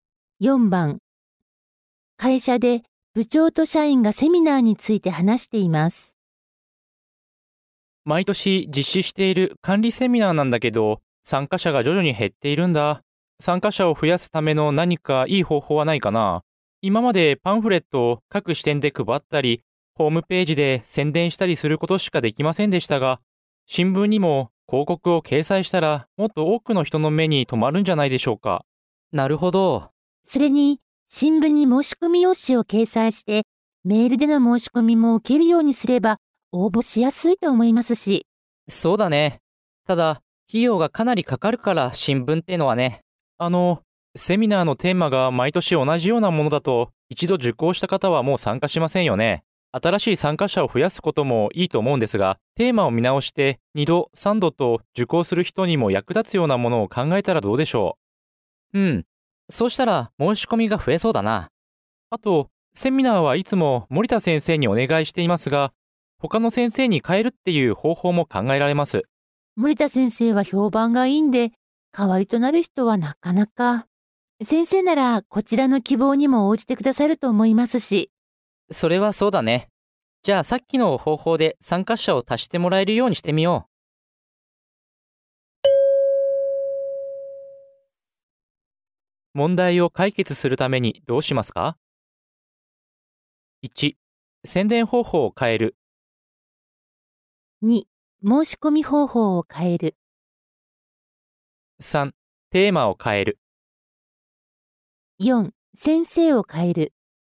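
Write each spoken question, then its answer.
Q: 問題を解決するためにどうしますか?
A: 3: テーマを変える。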